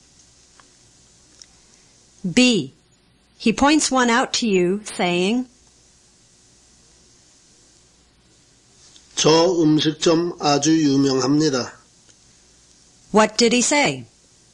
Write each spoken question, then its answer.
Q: What did he say?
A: He said, that restaurant is very famous.